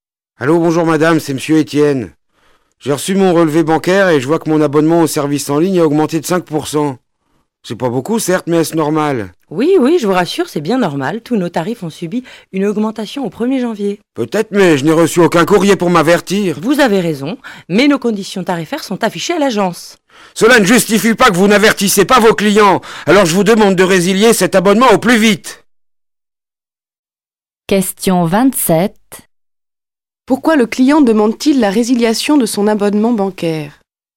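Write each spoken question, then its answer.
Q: Pourquoi le client demande-t-il la résiliation de son abonnement bancaire?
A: Parce que le tarif a augmenté de 5% sans qu'il en soit averti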